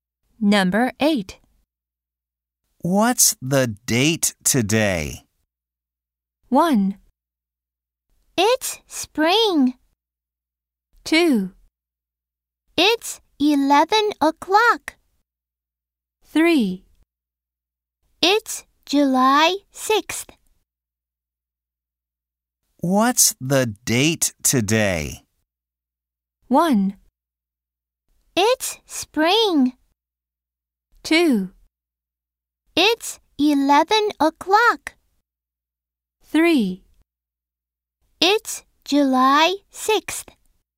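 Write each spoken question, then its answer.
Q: What's the date today?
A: 3: It's July 6th.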